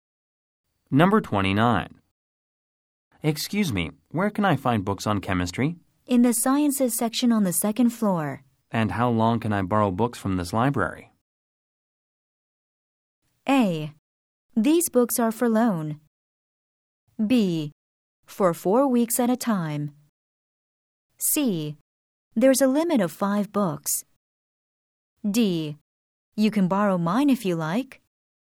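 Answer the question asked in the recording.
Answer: B: For 4 weeks at a time.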